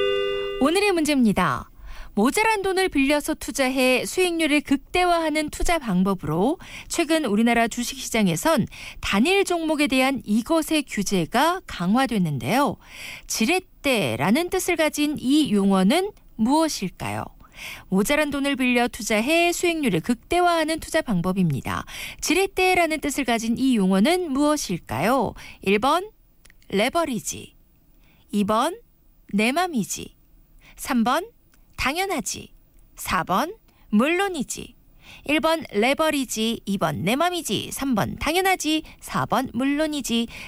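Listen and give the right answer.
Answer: 1: 레버리지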